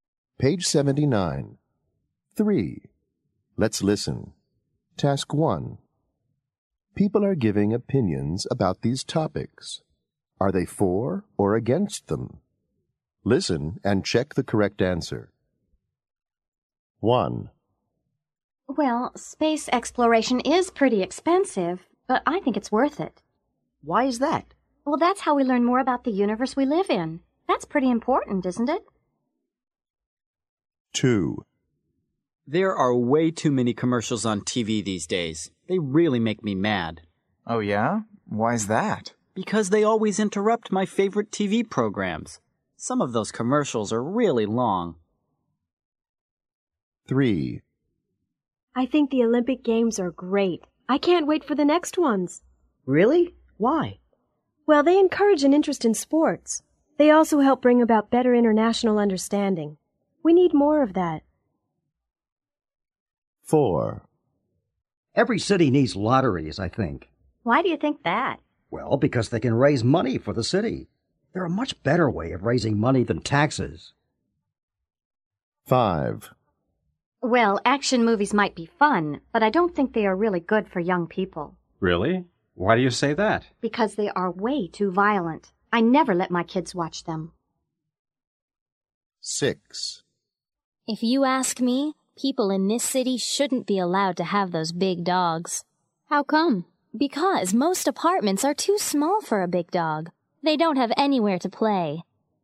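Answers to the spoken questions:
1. For
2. Against
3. For
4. For
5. Against
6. Against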